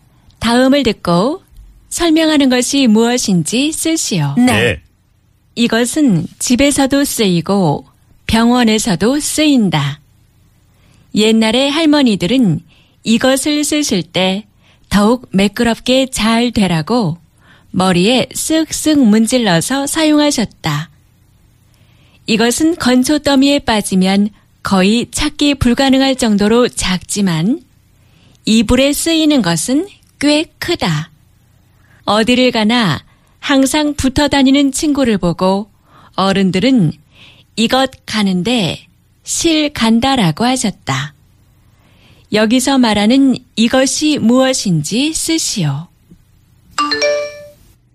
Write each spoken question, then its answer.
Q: 여기서 말하는 이것이 무엇인지 쓰시오.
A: needle. 바늘.